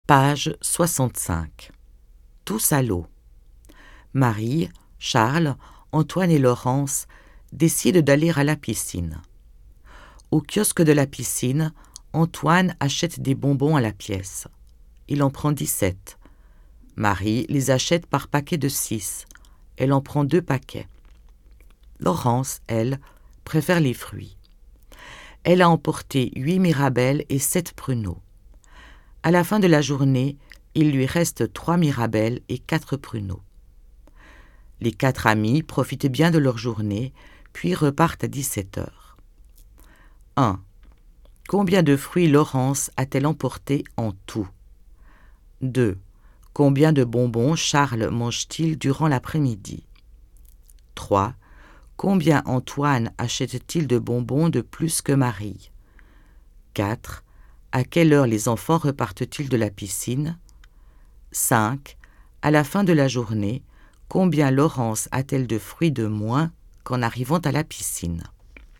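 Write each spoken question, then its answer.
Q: Combien de fruits Laurence a-t-elle emporté en tout?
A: 15 fruits

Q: Combien Antoine achète-t-il de bonbons de plus que Marie?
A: 5 bonbons de plus

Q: À quelle heure les enfants repartent-ils de la piscine?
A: À 17 heures

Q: À la fin de la journée, combien Laurence a-t-elle de fruits de moins qu'en arrivant à la piscine?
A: 8 fruits de moins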